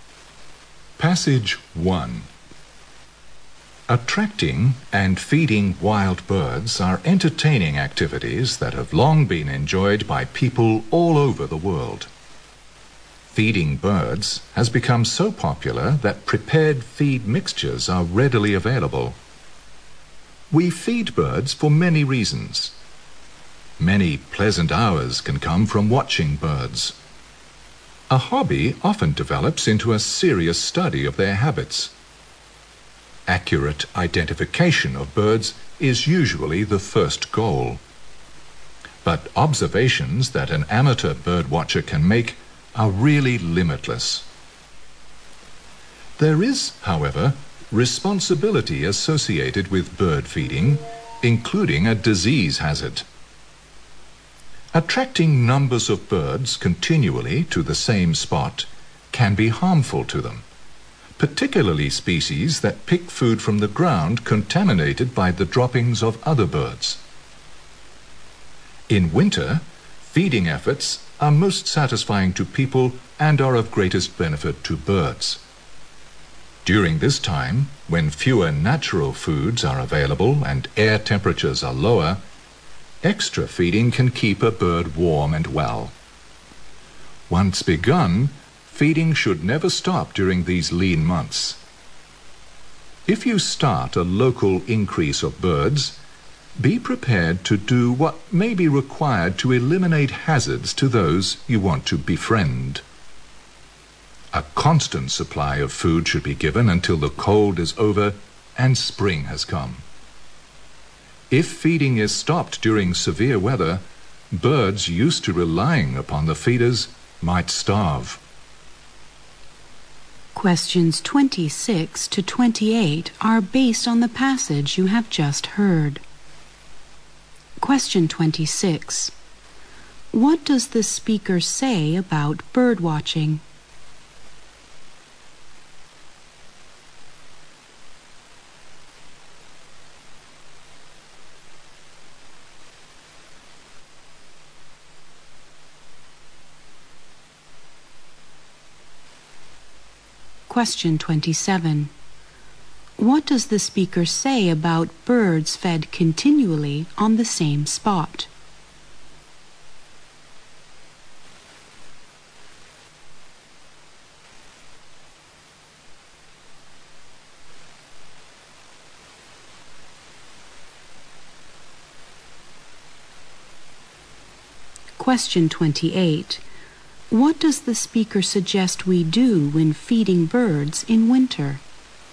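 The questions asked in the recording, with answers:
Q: What does the speaker say about bird watching?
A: It can turn into a serious study of birds' habits.

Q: What does the speaker say about birds fed continually on the same spot?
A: They may catch diseases.

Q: What does the speaker suggest we do when feeding birds in winter?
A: Keep a constant supply of food until spring.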